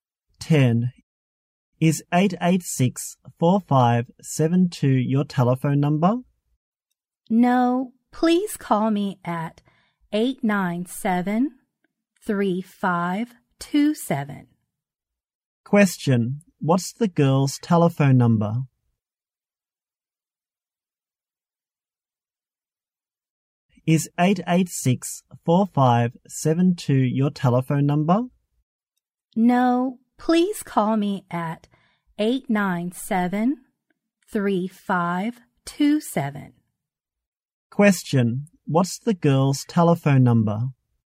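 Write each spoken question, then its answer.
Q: What's the girl's telephone number?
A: 897-3527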